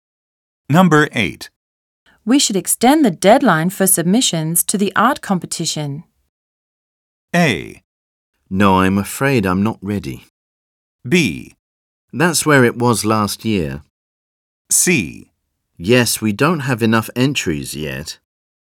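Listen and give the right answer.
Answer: C: Yes, we don't have enough entries yet.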